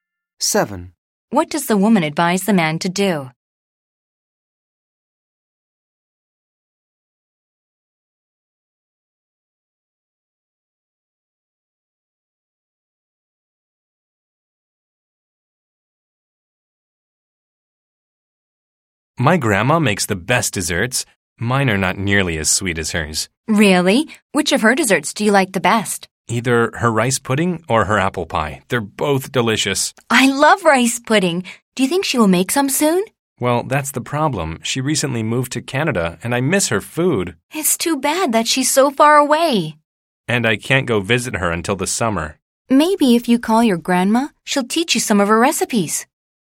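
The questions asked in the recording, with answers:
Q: What does the woman advise the man to do?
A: Call his grandma and ask her to teach him her recipes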